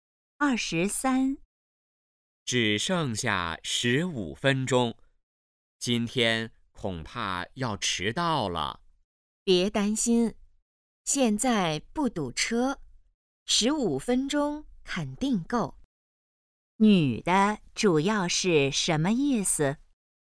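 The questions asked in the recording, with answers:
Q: 女的主要是什么意思?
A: 不会迟到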